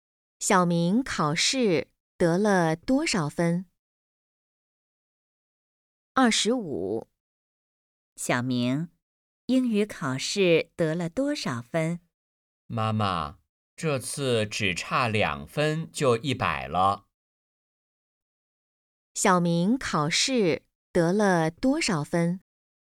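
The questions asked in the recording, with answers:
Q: 小明考试得了多少分?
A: 98分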